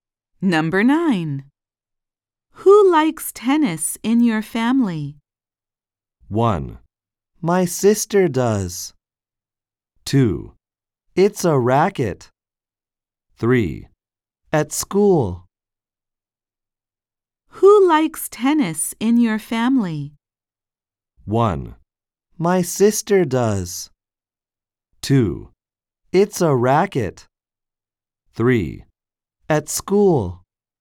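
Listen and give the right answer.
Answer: 1: My sister does.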